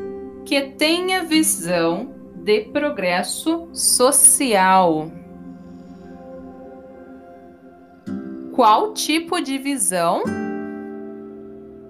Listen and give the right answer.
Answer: progresso social. Alguém que tenha visão de progresso social.